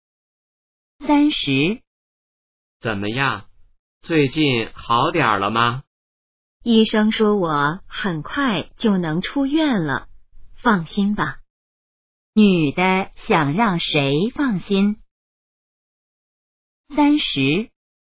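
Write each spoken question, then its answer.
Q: 女的想让谁放心?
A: 男的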